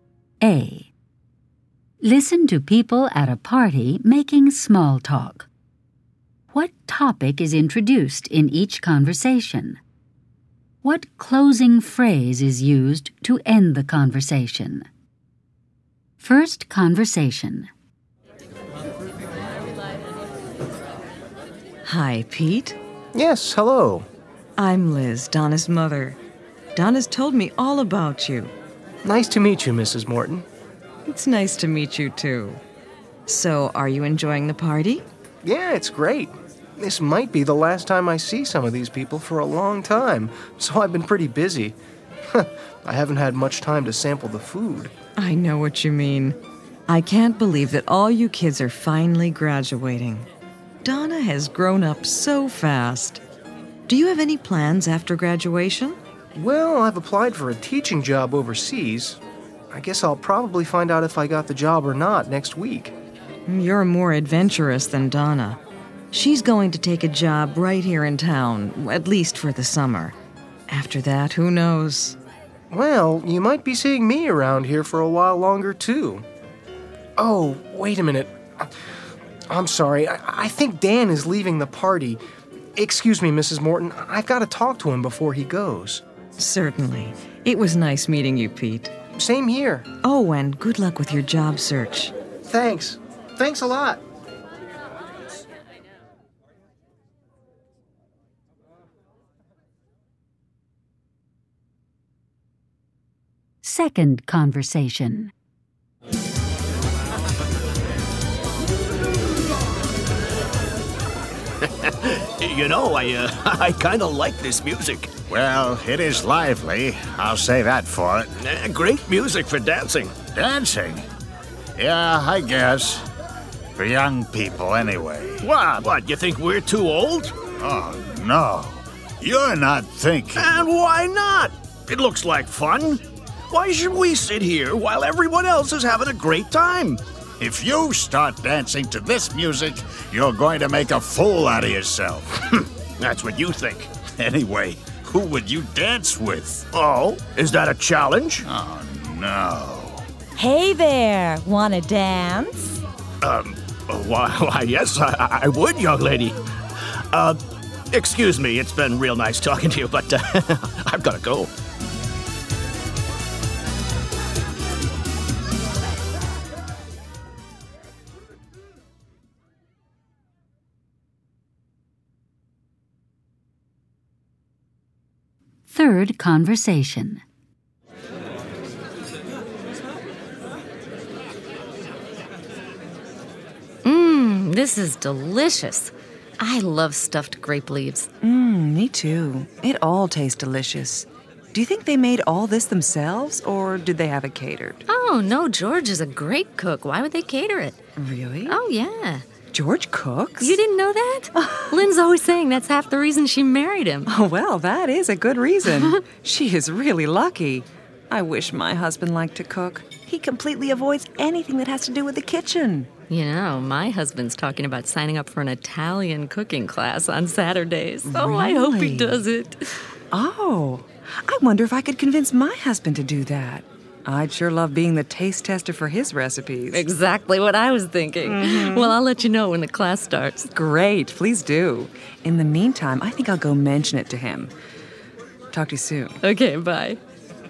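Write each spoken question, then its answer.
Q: What topic is introduced in each conversation?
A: Graduation and plans after graduation

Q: What topic is introduced in each conversation?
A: The music and dancing

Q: What closing phrase is used to end the conversation?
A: It's been real nice talking to you, but I've gotta go

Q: What topic is introduced in each conversation?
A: The food and George's cooking

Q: What closing phrase is used to end the conversation?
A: Talk to you soon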